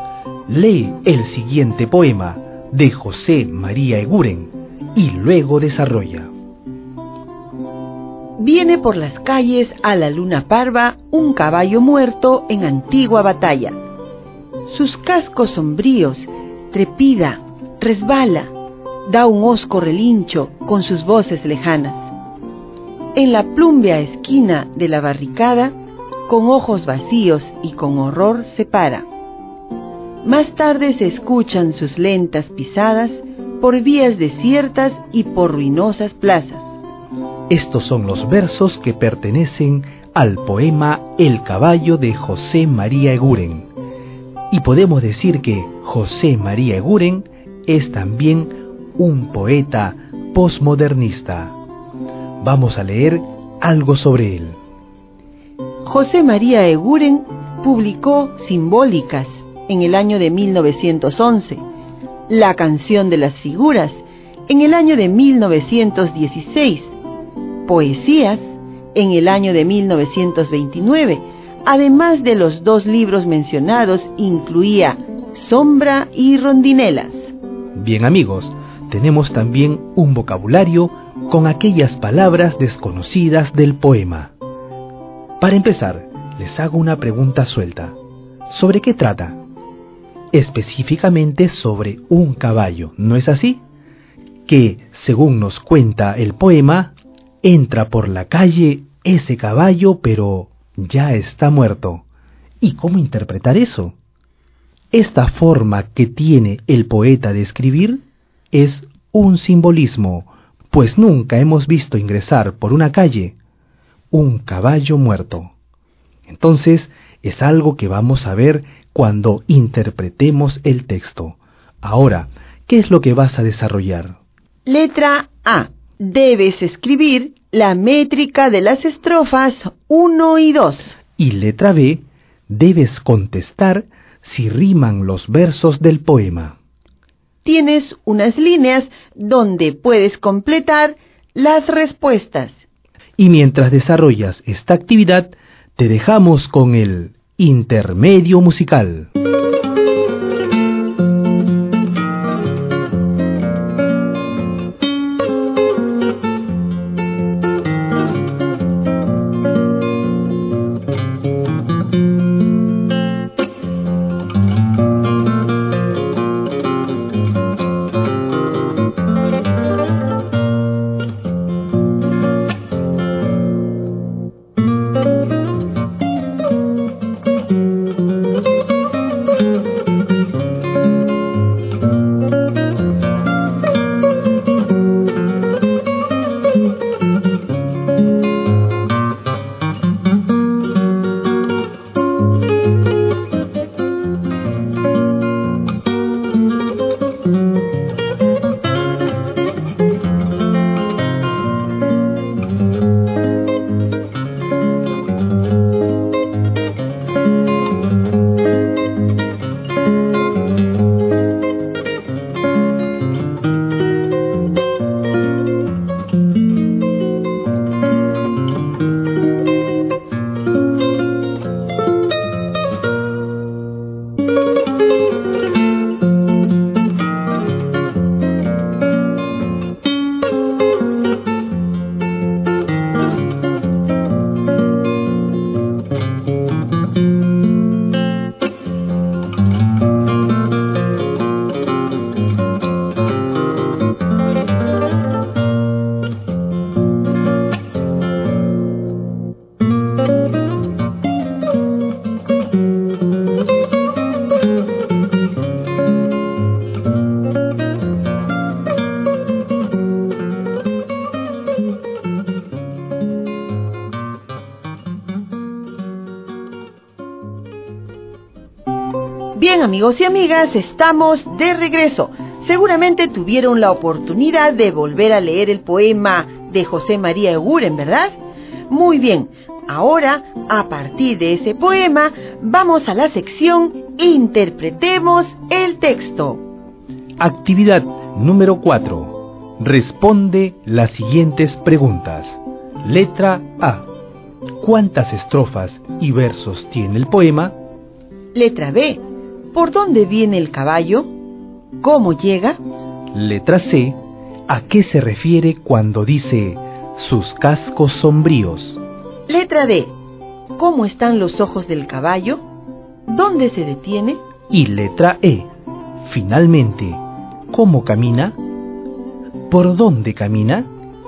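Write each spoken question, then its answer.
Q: ¿Por dónde viene el caballo? ¿Cómo llega?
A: Viene por las calles, a la luna parva; es un caballo muerto en antigua batalla

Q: ¿Cómo están los ojos del caballo? ¿Dónde se detiene?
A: Tiene los ojos vacíos; se detiene en la plúmbea esquina de la barricada

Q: Finalmente, ¿cómo camina? ¿Por dónde camina?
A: Con lentas pisadas, por vías desiertas y por ruinosas plazas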